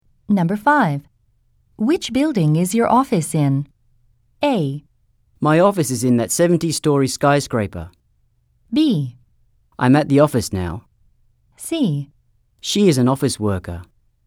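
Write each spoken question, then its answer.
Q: Which building is your office in?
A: A: My office is in that 70-story skyscraper.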